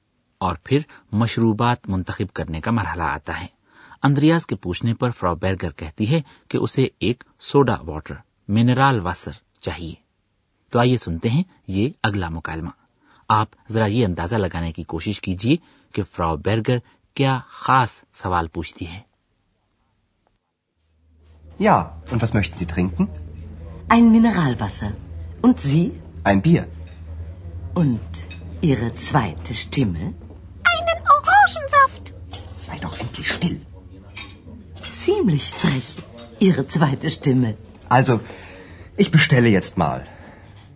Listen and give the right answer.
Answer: وہ کہتی ہے اور آپ کی دوسری آواز